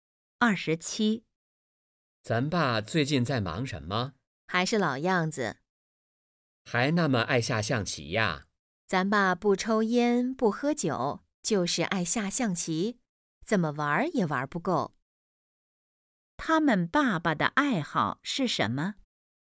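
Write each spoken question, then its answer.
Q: 他们爸爸的爱好是什么?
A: 下象棋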